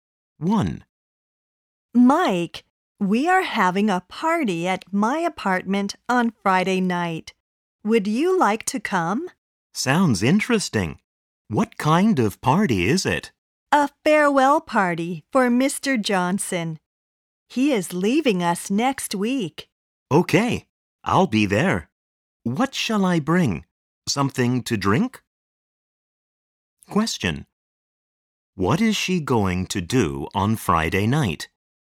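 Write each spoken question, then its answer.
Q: What is she going to do on Friday night?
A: Have a farewell party for Mr. Johnson at her apartment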